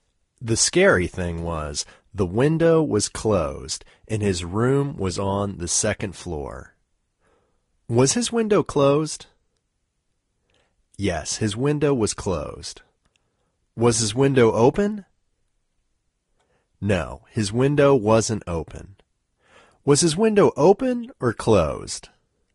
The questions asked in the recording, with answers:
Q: Was his window open or closed?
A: His window was closed.